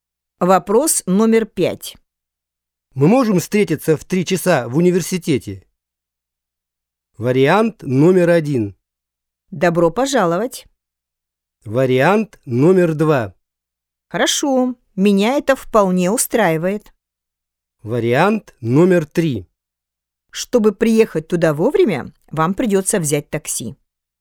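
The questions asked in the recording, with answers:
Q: Мы можем встретиться в 3 часа в университете?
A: 2: Хорошо, меня это вполне устраивает.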